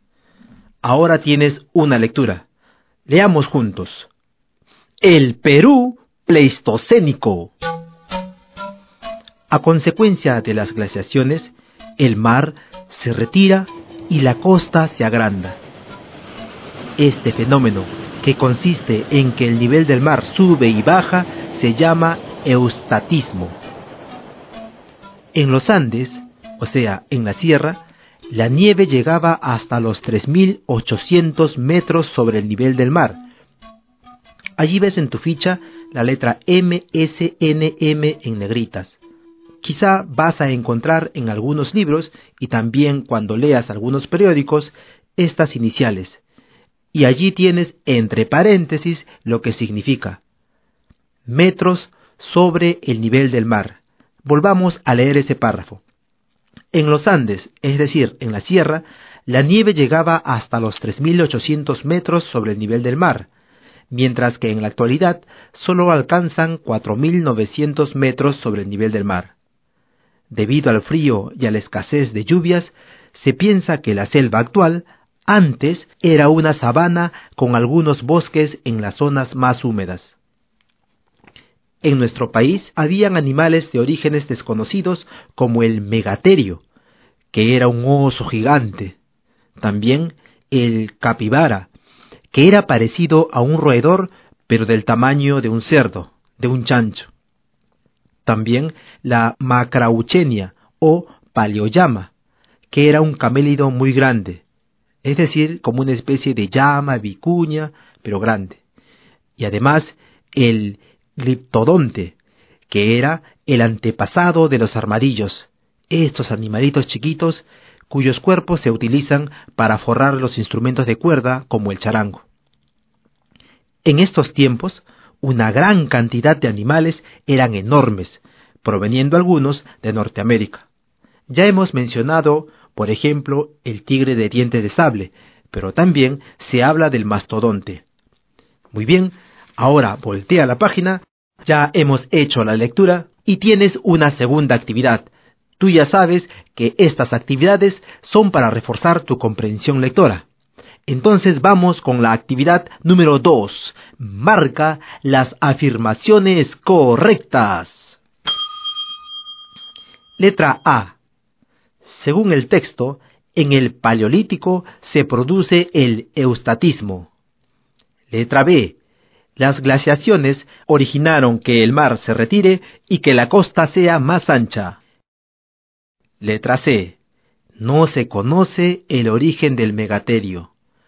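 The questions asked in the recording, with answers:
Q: Letra B. Las glaciaciones originaron que el mar se retire y que la costa sea más ancha.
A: Correcta

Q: Letra C. No se conoce el origen del megaterio.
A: Correcta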